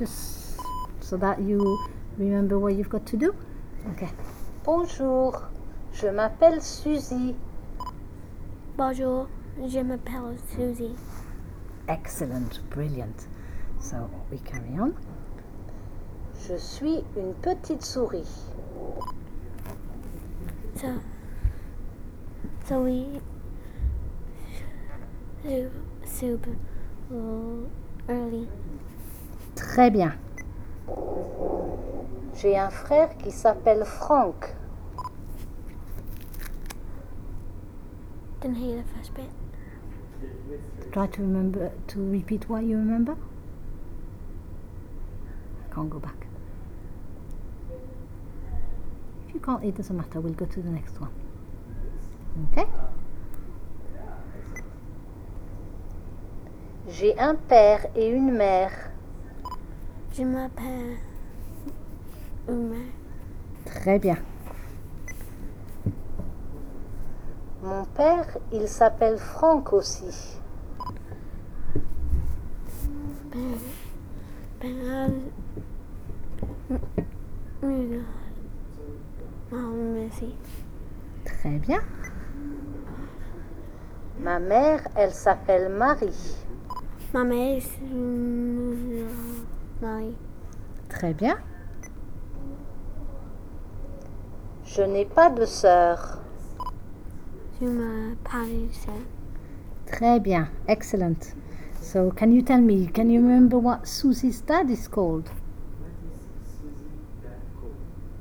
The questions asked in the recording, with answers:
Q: can you remember what Susie's dad is called?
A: He was called Franck.